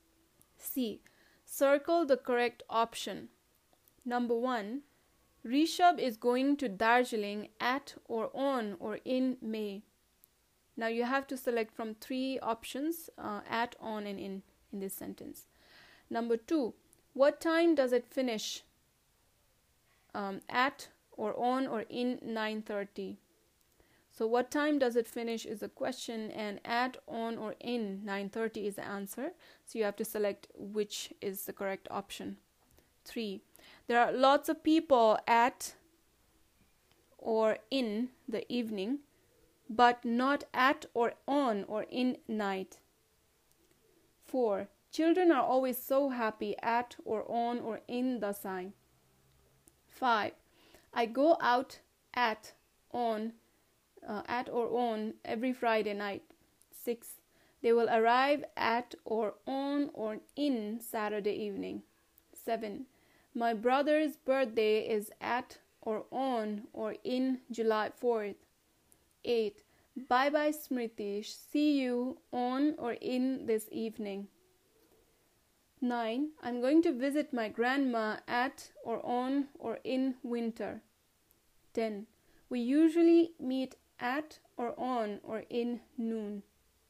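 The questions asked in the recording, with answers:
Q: Number 1. Rishab is going to Darjeeling at or on or in May.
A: C: in

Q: Number two, what time does it finish? Um, at or on or in 9:30.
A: A: at

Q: Three, there are lots of people at or in the evening but not at or on or in night.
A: in the evening; at night

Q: 6. They will arrive at or on or in Saturday evening.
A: B: on

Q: 7. My brother's birthday is at or on or in July 4th.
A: B: on

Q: 9. I'm going to visit my grandma at or on or in winter.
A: C: in

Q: 10. We usually meet at or on or in noon.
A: A: at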